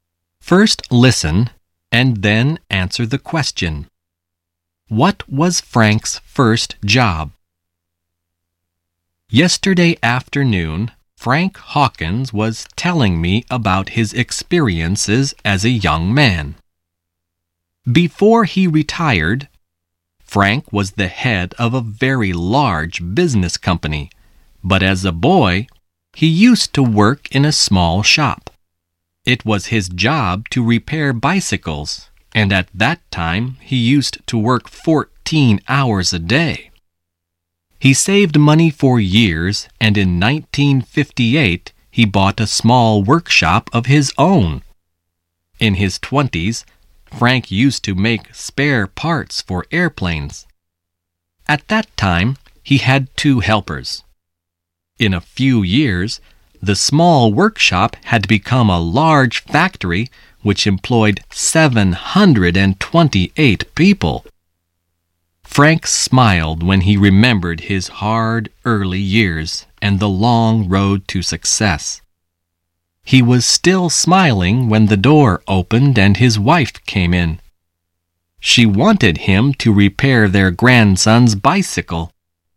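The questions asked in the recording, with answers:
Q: What was Frank's first job?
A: He repaired bicycles in a small shop.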